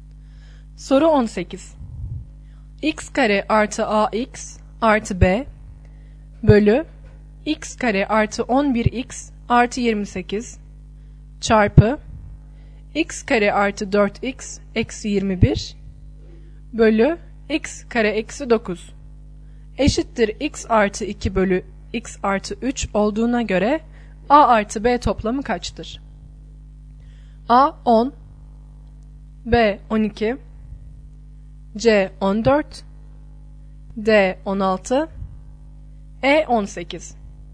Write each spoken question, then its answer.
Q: X kare artı AX artı B bölü X kare artı 11X artı 28 çarpı x kare artı 4x eksi 21 bölü x kare eksi 9 eşittir x artı 2 bölü x artı 3 olduğuna göre a artı b toplamı kaçtır?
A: Doğru yanıt C şıkkı.